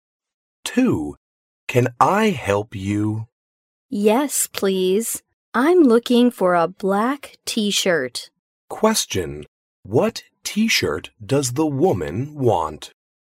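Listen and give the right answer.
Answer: A black t-shirt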